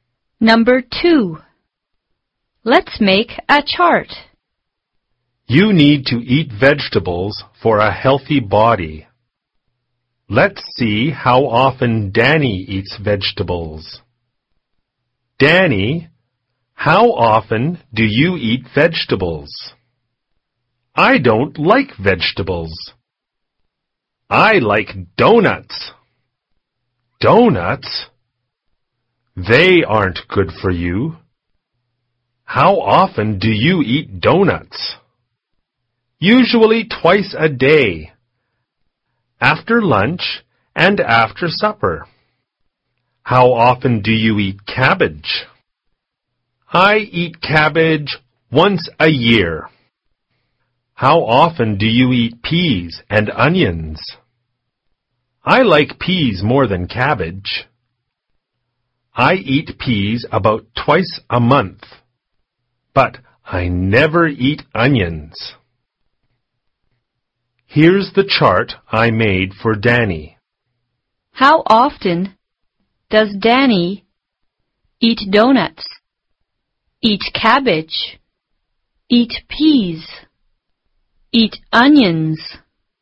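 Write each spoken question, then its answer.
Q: How often does Danny eat donuts, eat cabbage, eat peas, eat onions?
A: Donuts twice a day, cabbage once a year, peas about twice a month, onions never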